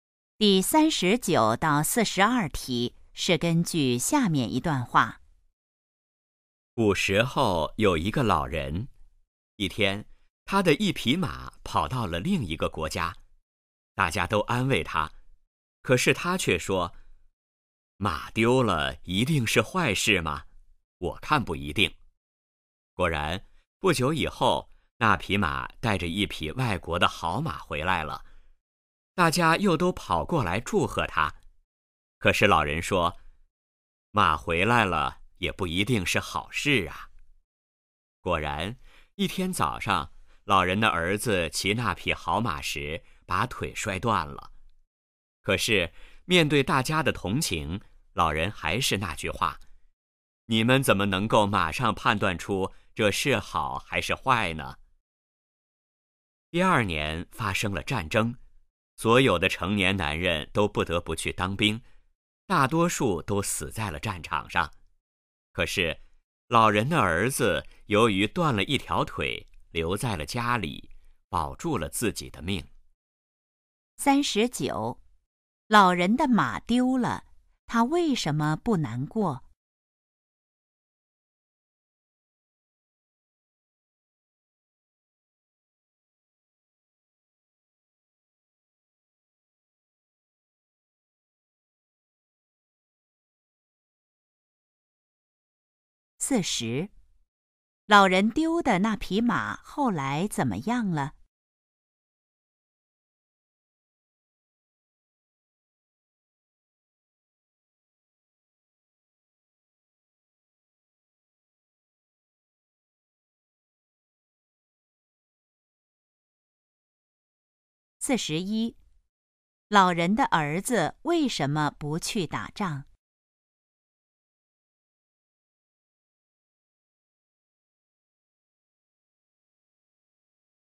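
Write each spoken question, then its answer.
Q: 老人丢的那匹马后来怎么样了?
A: 带着一匹外国的好马回来了

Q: 老人的儿子为什么不去打仗?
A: 他断了一条腿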